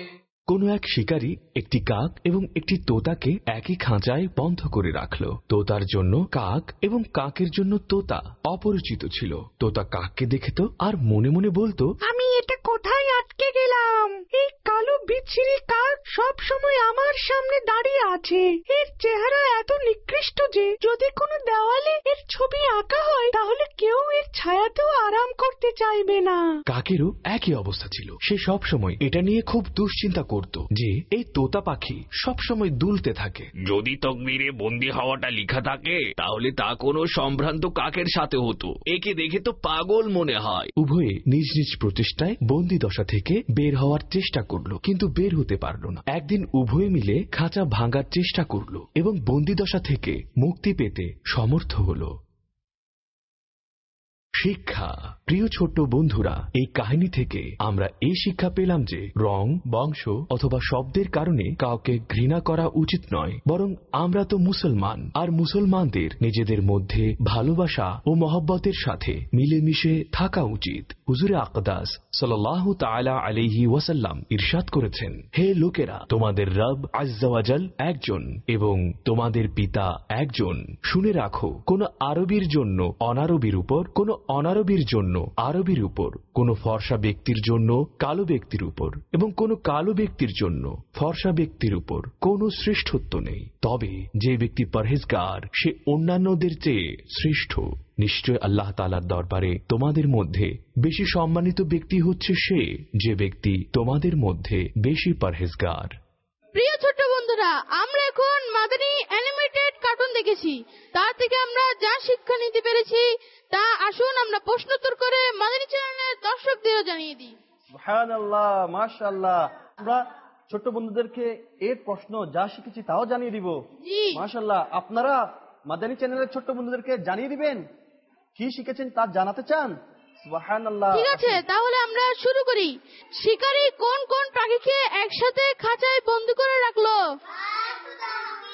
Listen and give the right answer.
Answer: সুবহানাল্লাহ, কাক আর তোতা পাখিকে না?